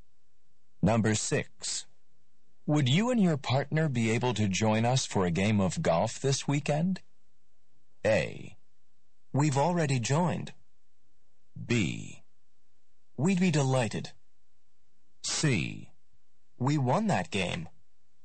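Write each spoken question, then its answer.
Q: Would you and your partner be able to join us for a game of golf this weekend?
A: B: We'd be delighted.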